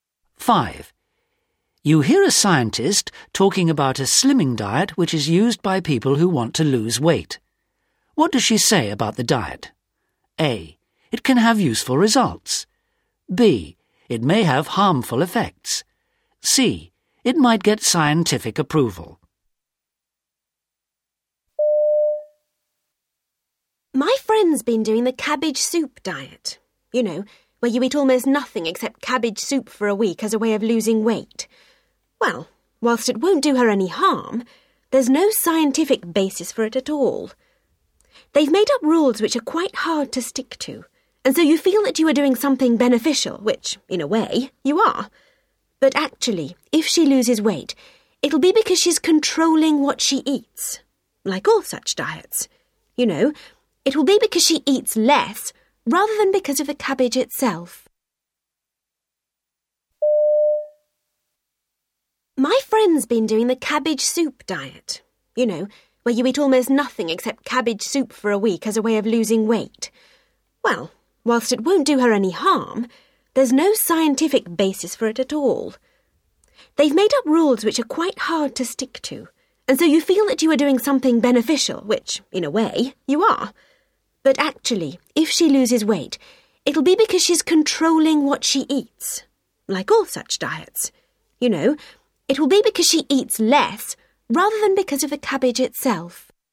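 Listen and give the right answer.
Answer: A: It can have useful results.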